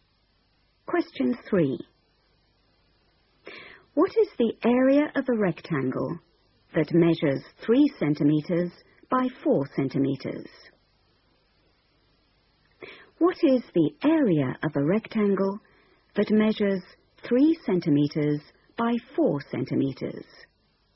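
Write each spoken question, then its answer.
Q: What is the area of a rectangle that measures 3 centimeters by 4 centimeters?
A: 12 square centimeters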